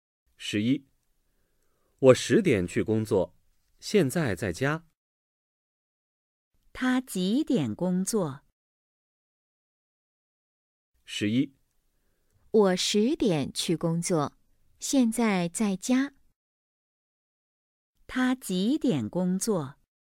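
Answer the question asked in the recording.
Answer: 十点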